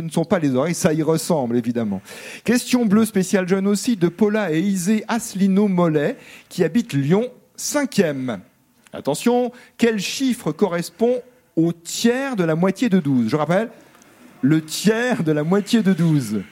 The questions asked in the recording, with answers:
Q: Attention, quel chiffre correspond au tiers de la moitié de 12?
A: Ben, c'est 2 la bonne réponse